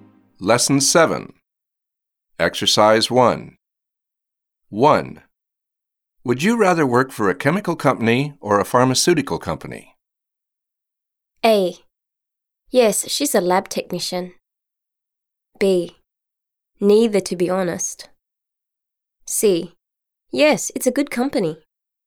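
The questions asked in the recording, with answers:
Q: Would you rather work for a chemical company or a pharmaceutical company?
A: B: Neither, to be honest.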